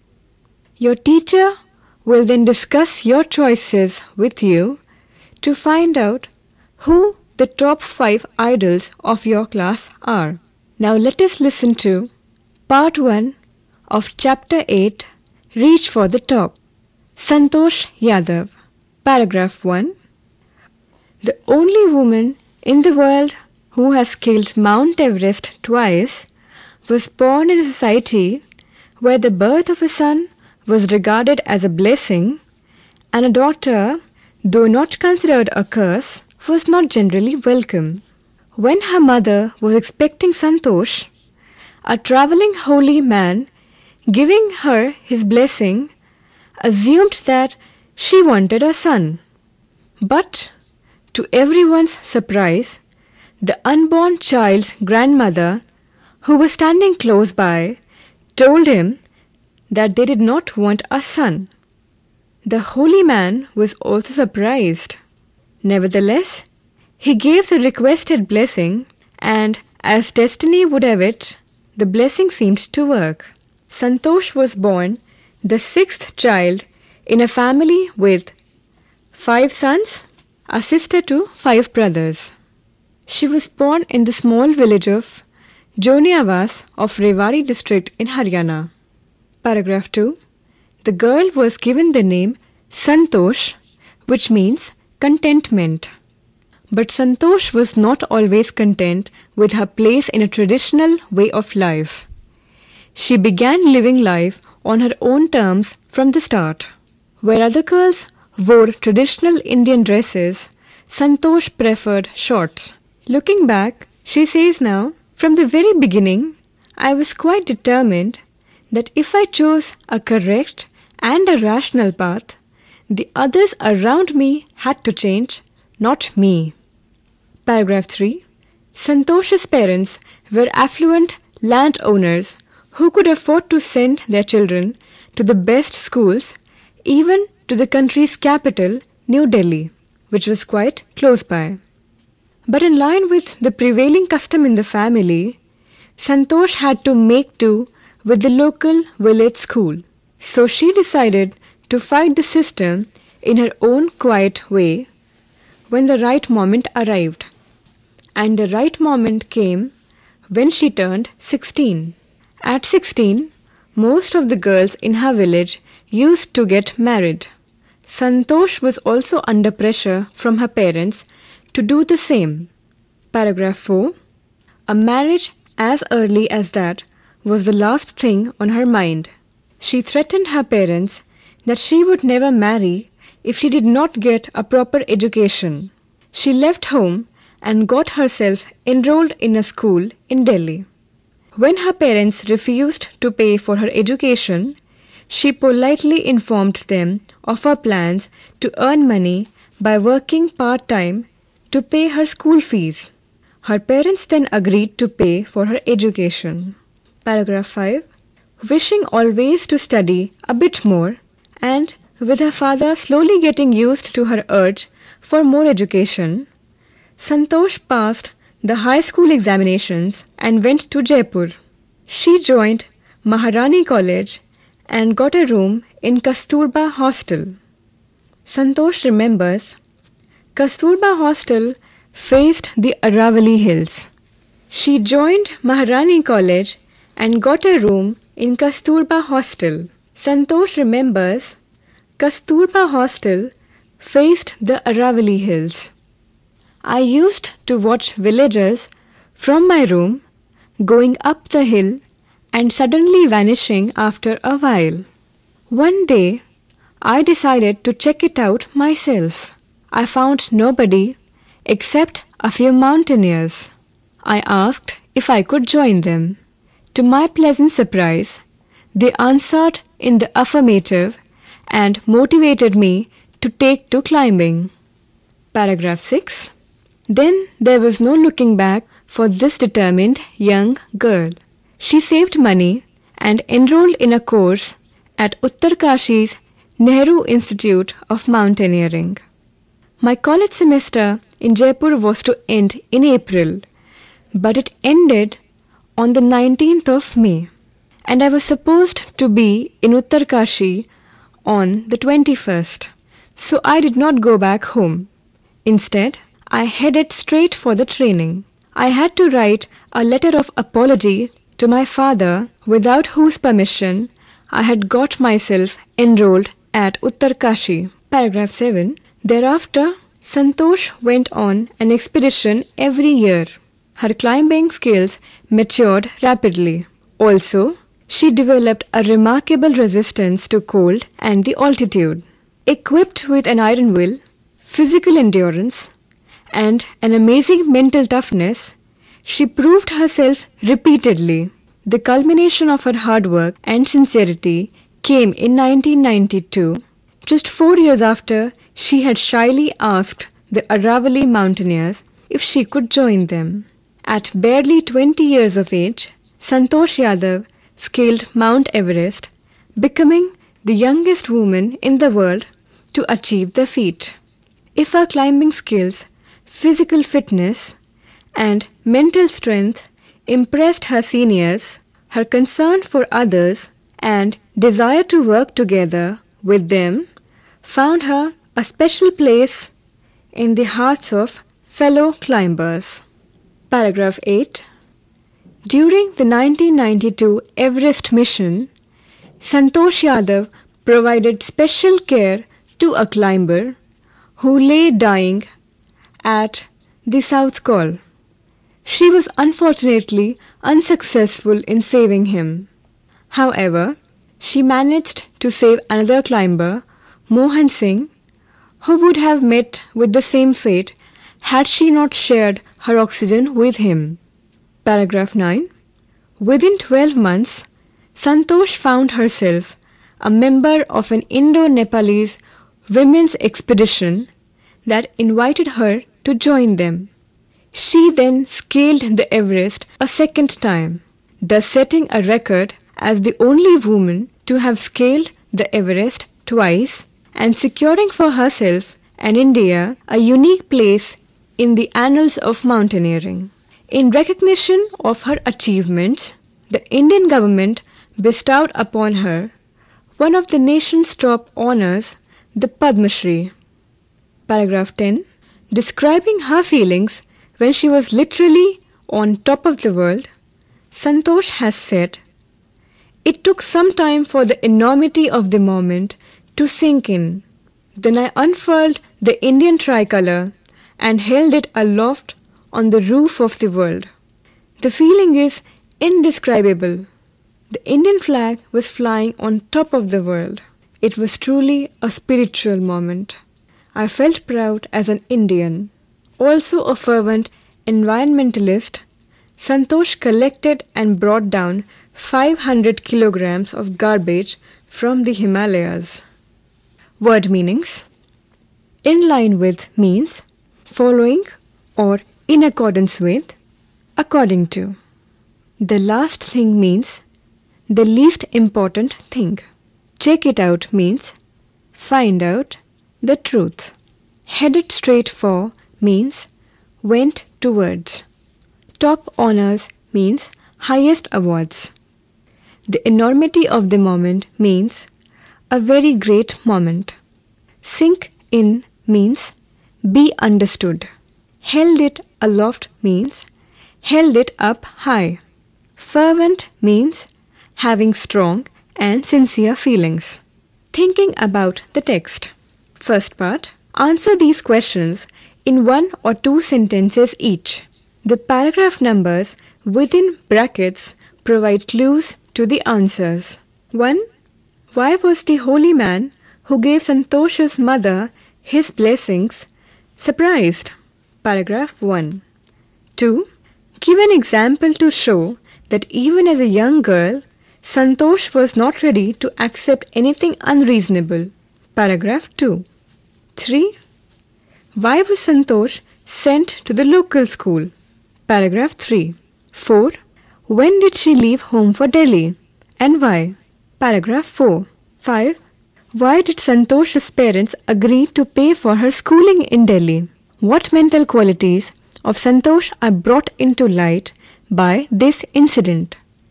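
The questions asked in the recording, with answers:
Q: Why was the holy man who gave Santosh's mother his blessings surprised?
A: Because the grandmother said they did not want a son, when he had assumed she wanted one.

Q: Give an example to show that even as a young girl, Santosh was not ready to accept anything unreasonable.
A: She wore shorts while other girls wore traditional Indian dresses.

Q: Why was Santosh sent to the local school?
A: Because of the family's custom, though her parents could have sent her to the best schools.

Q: When did she leave home for Delhi and why?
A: At 16, when she was pressured to marry; she left to get a proper education.

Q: Why did Santosh's parents agree to pay for her schooling in Delhi?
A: Because she said she would work part-time to pay her own fees.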